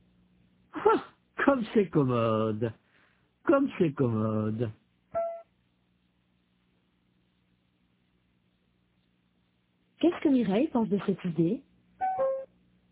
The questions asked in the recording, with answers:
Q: Qu'est-ce que Mireille pense de cette idée?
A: Elle pense que c'est commode.